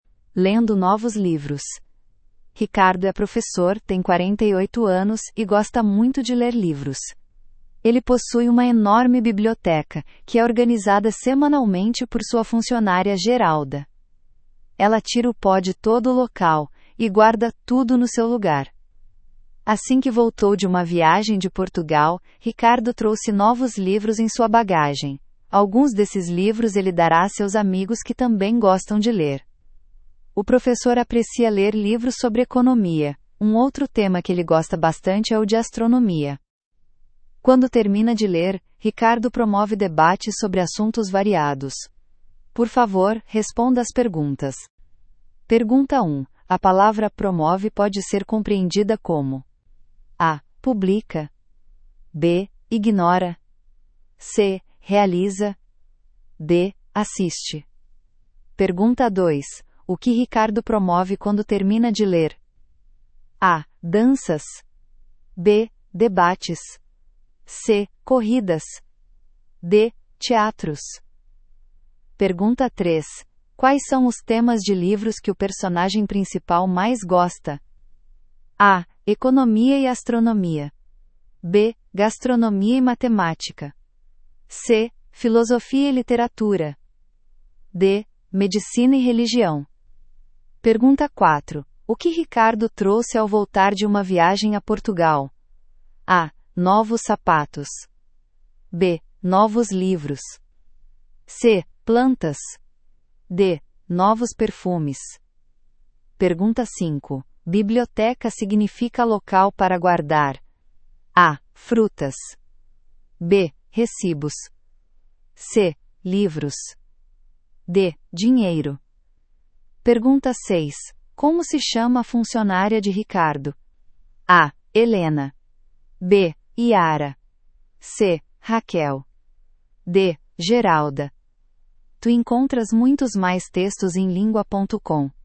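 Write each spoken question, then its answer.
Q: A palavra promove pode ser compreendida como:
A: C: Realiza

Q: O que Ricardo promove quando termina de ler?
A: B: Debates

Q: Quais são os temas de livros que o personagem principal mais gosta?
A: A: Economia e astronomia

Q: O que Ricardo trouxe ao voltar de uma viagem a Portugal?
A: B: Novos livros

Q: Biblioteca significa local para guardar?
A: C: Livros

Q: Como se chama a funcionária de Ricardo?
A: D: Geralda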